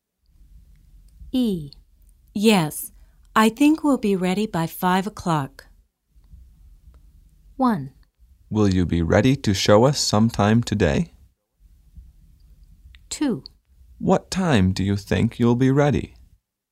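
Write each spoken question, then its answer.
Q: Yes, I think we'll be ready by 5 o'clock.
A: 1: Will you be ready to show us sometime today?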